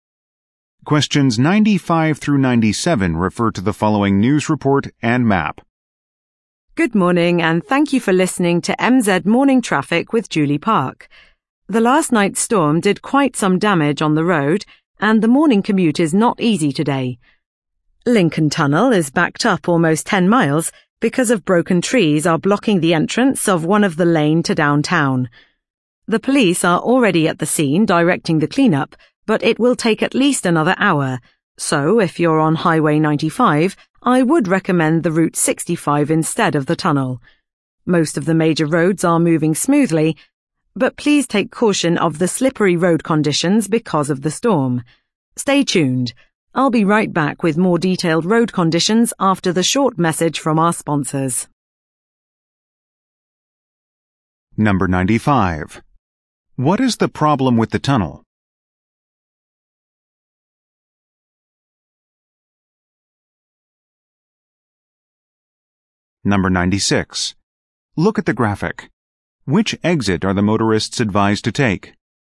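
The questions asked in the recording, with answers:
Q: What is the problem with the tunnel?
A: Broken trees are blocking an entrance lane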